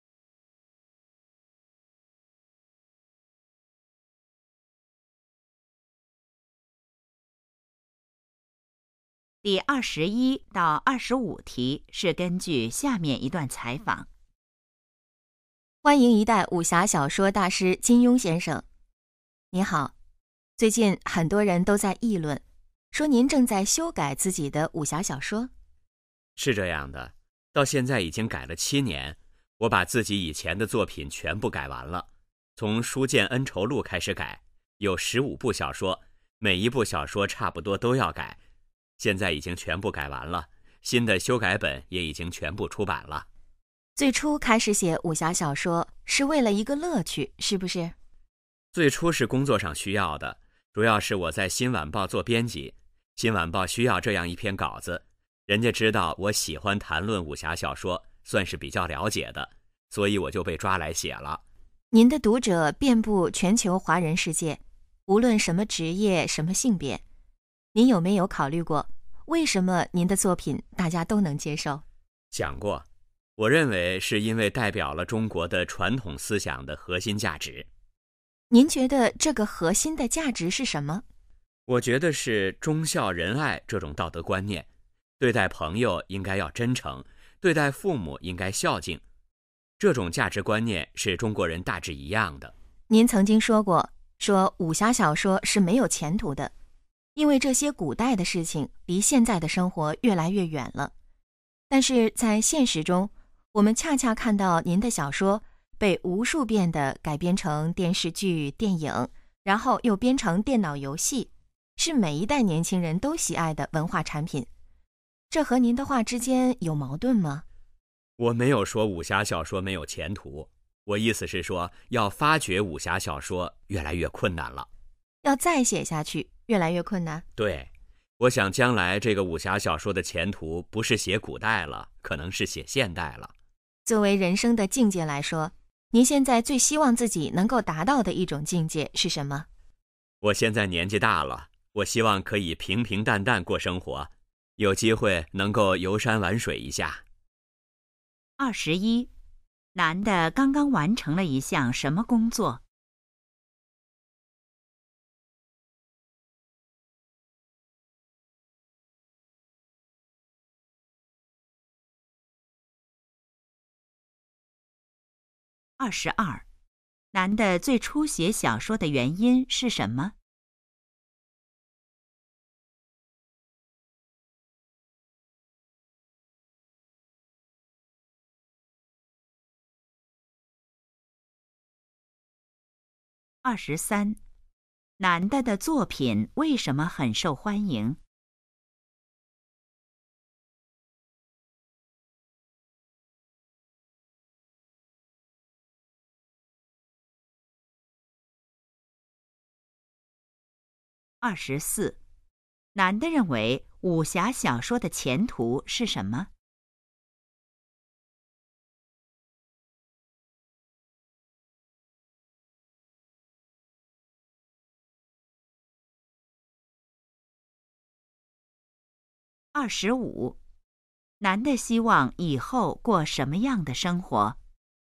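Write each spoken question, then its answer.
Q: 男的刚刚完成了一项什么工作?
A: 修改自己以前的武侠小说

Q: 男的最初写小说的原因是什么?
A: 工作需要,新晚报需要稿子

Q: 男的的作品为什么很受欢迎?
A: 代表了中国传统思想的核心价值

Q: 男的认为武侠小说的前途是什么?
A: 可能是写现代

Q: 男的希望以后过什么样的生活?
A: 平平淡淡,游山玩水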